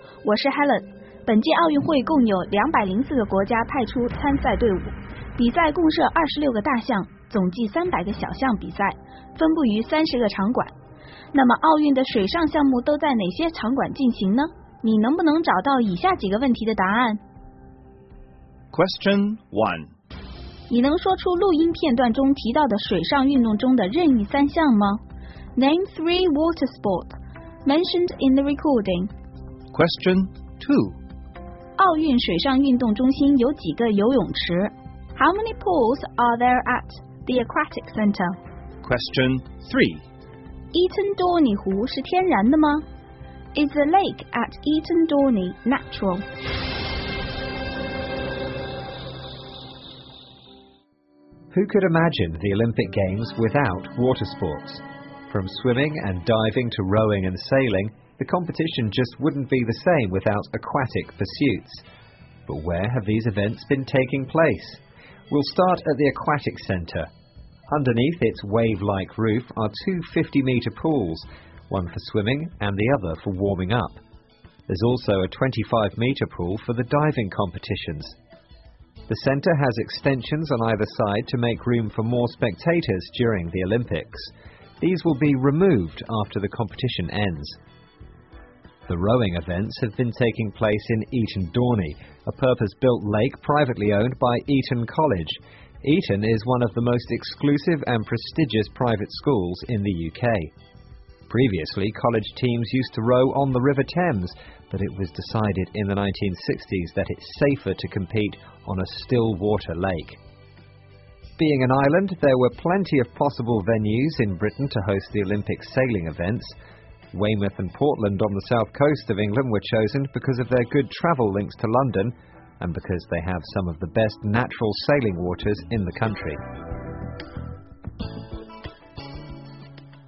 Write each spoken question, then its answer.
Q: Name three water sports mentioned in the recording.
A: 录音片段中提到好些水上运动项目,其中有游泳 swimming, 跳水 diving, 划船 rowing, 还有帆船 sailing.

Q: How many pools are there at the aquatic center?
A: 坐落在奥运村的水上运动中心里一共有三个游泳池,两个50米长的游泳池,还有一个25米长的跳水池。

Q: Is the lake at Eton Dorney natural?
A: 划船比赛是在伊藤多尼湖进行的,这完全是一个人造湖,是属于著名私校伊顿工学院的。